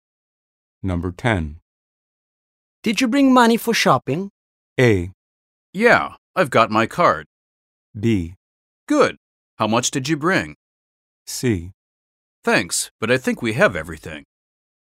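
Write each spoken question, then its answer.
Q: Did you bring money for shopping?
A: A: Yeah, I've got my card.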